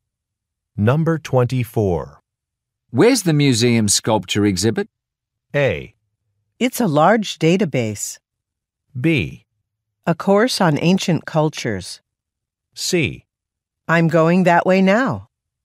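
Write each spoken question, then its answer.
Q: Where's the museum sculpture exhibit?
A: C: I'm going that way now.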